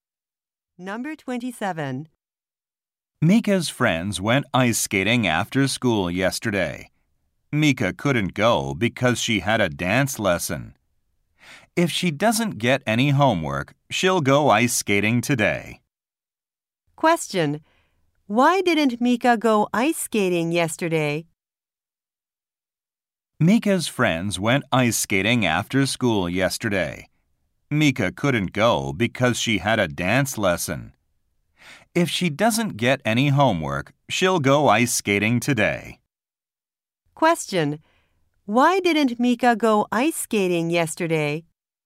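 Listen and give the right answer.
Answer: She had a dance lesson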